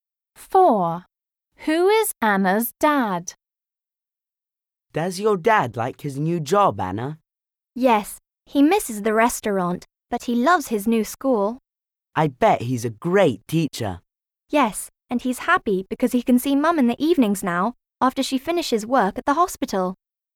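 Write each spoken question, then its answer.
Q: Who is Anna's dad?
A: a teacher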